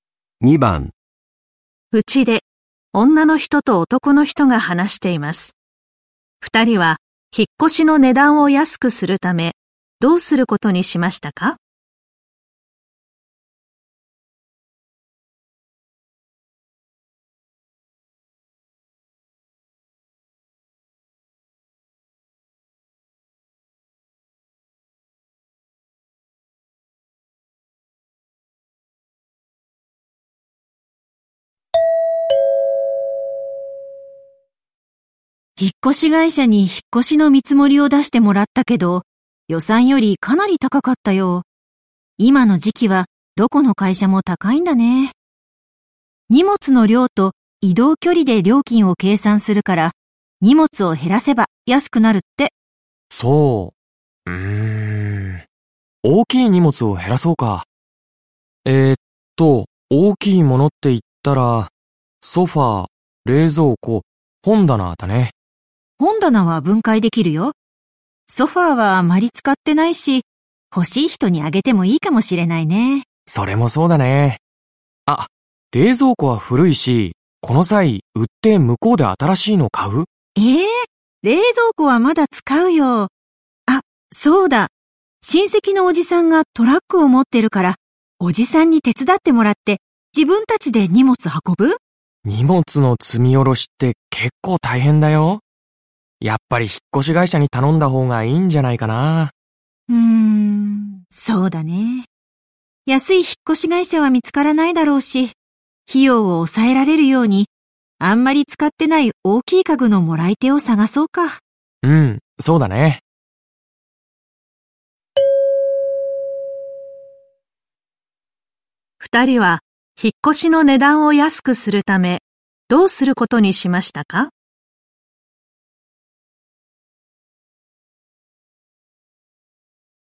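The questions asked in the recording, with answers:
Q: 二人は引っ越しの値段を安くするため、どうすることにしましたか?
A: あまり使っていないソファー(大きい家具)をもらってくれる人を探す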